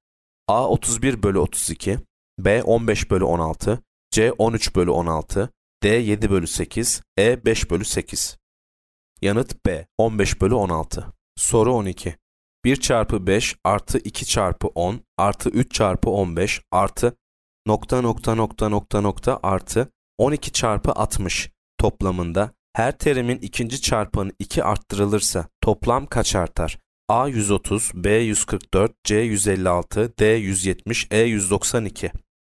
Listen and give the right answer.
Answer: Yanıt C 156.